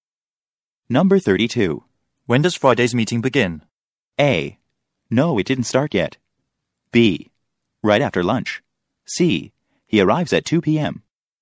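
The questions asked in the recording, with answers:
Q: When does Friday's meeting begin?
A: B: Right after lunch.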